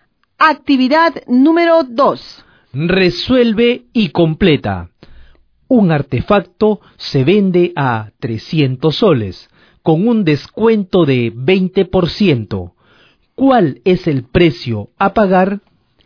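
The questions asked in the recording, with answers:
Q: ¿Cuál es el precio a pagar?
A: 240 soles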